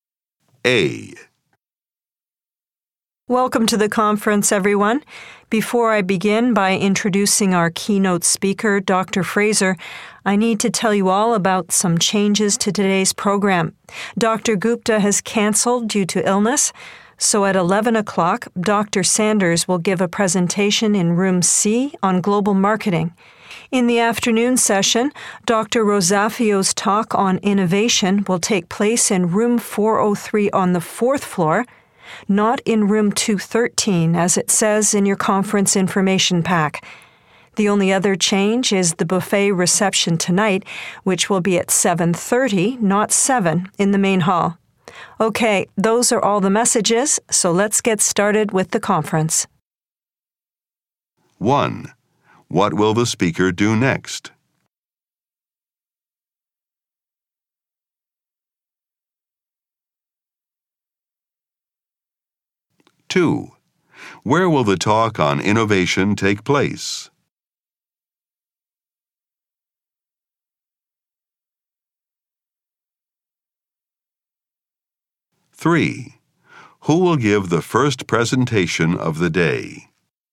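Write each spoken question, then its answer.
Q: What will the speaker do next?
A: Introduce the keynote speaker, Dr. Fraser

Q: Where will the talk on innovation take place?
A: In Room 403 on the fourth floor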